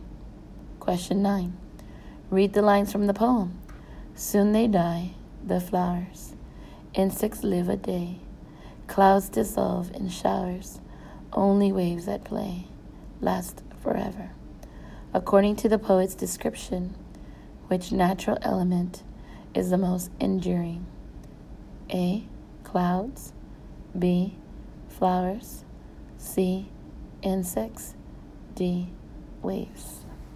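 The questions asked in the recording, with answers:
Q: According to the poet's description, which natural element is the most enduring?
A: D: Waves.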